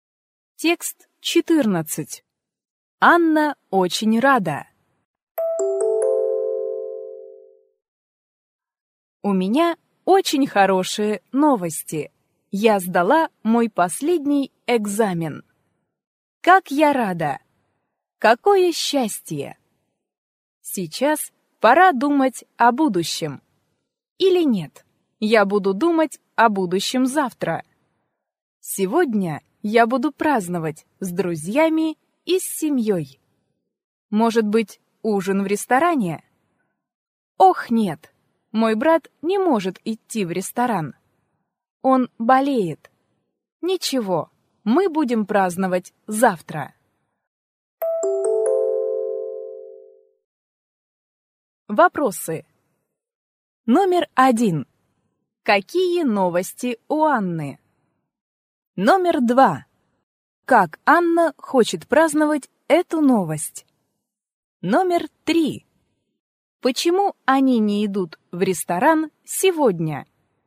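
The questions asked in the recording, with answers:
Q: Какие новости у Анны?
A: Она сдала последний экзамен.

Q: Как Анна хочет праздновать эту новость?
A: С друзьями и с семьёй, может быть, ужином в ресторане.

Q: Почему они не идут в ресторан сегодня?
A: Её брат болеет.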